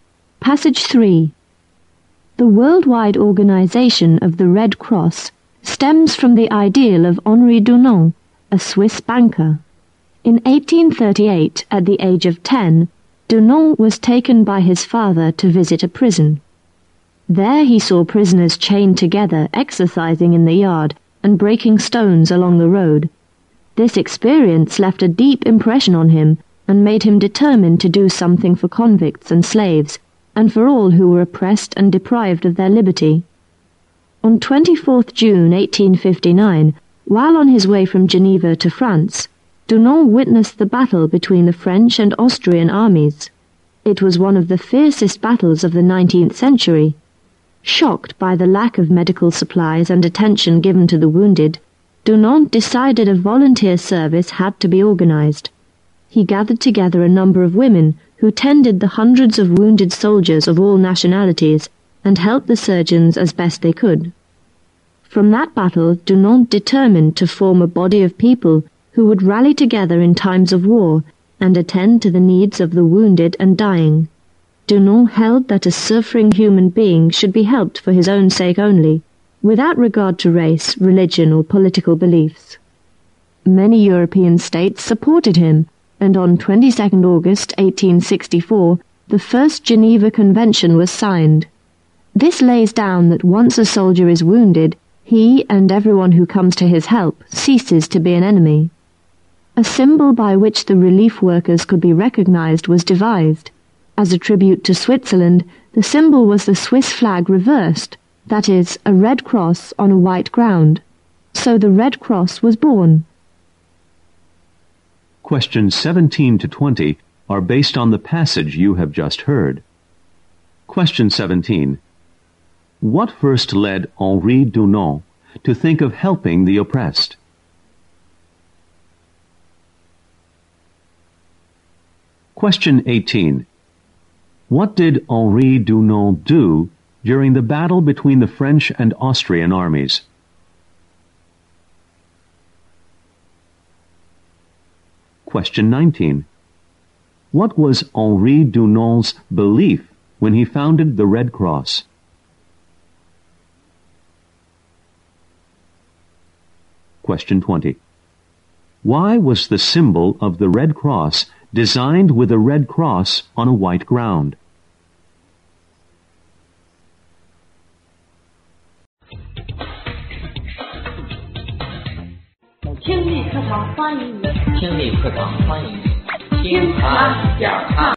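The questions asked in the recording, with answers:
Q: What first led Henri Dunant to think of helping the oppressed?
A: Visiting a prison with his father at age 10

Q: What did Henri Dunant do during the battle between the French and Austrian armies?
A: He organized volunteer women to care for the wounded.

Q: What was Henri Dunant's belief when he founded the Red Cross?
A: Suffering people should be helped regardless of race, religion or political beliefs.

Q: Why was the symbol of the Red Cross designed with a red cross on a white ground?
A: As a tribute to Switzerland (the Swiss flag reversed)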